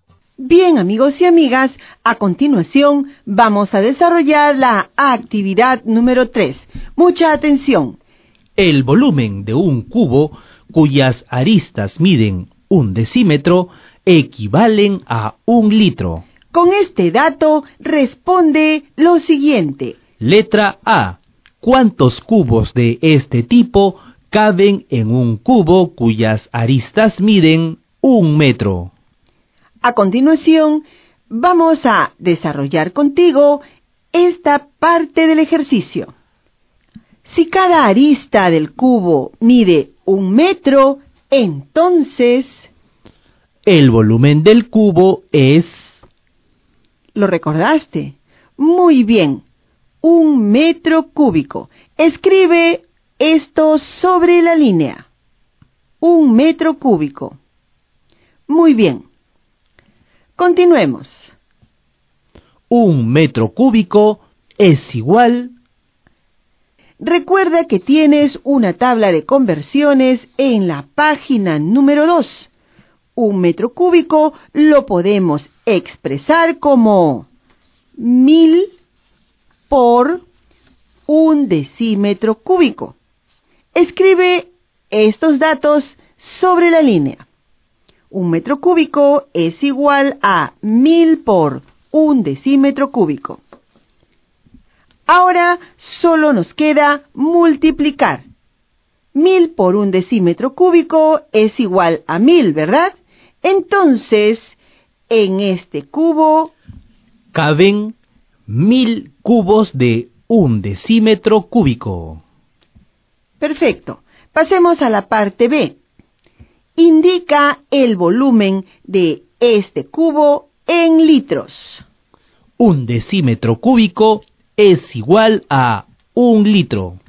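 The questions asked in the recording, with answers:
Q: Indica el volumen de este cubo en litros.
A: 1000 litros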